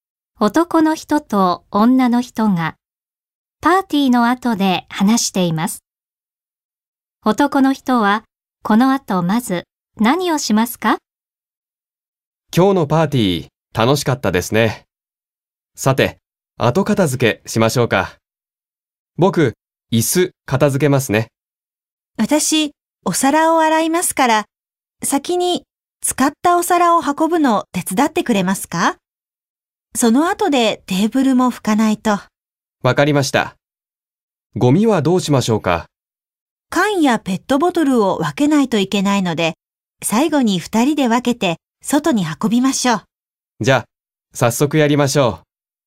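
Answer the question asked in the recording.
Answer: 使ったお皿を運ぶ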